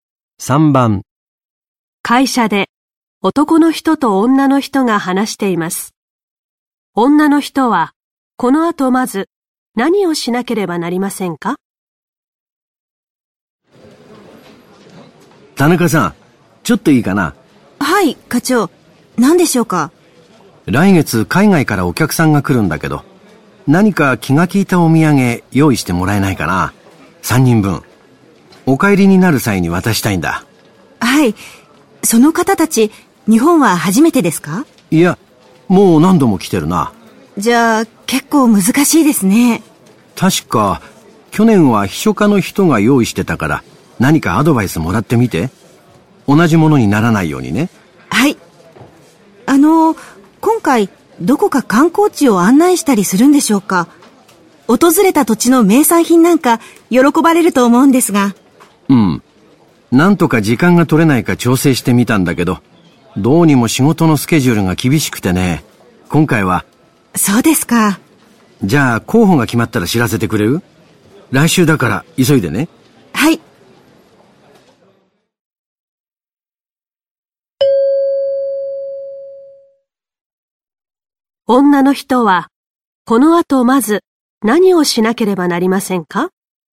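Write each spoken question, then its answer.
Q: 女の人はこの後まず何をしなければなりませんか?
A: 秘書課の人にアドバイスをもらう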